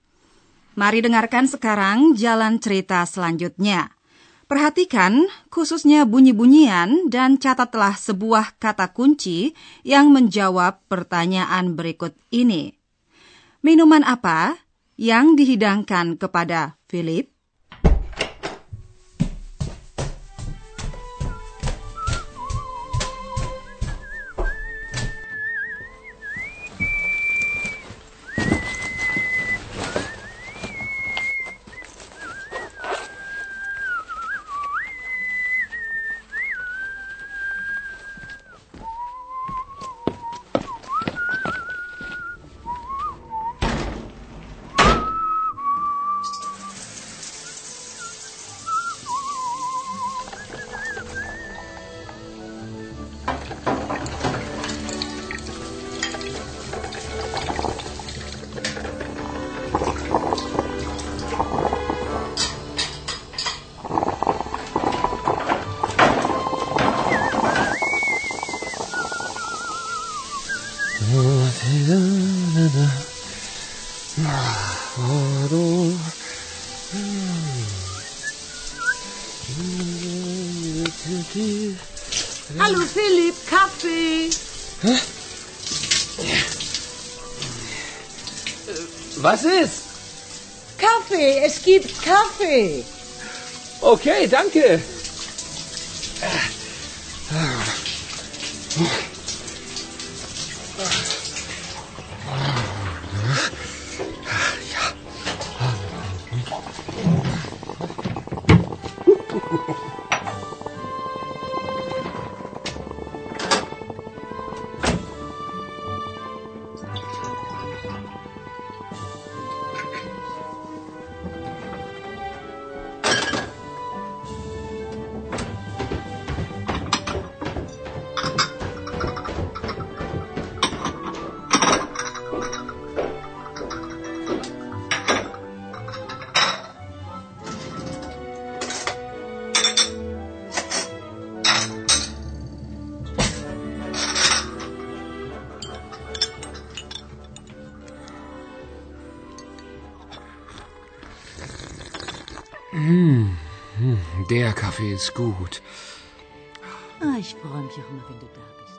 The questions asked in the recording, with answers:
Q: Minuman apa yang dihidangkan kepada Philip?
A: memanjakannya dengan hidangan kopi